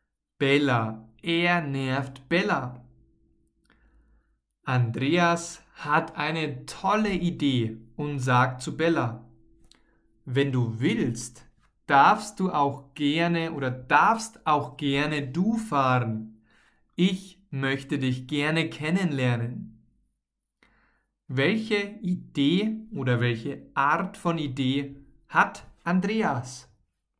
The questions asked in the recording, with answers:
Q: Welche Idee oder welche Art von Idee hat Andreas?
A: Eine tolle. Er hat eine tolle Idee.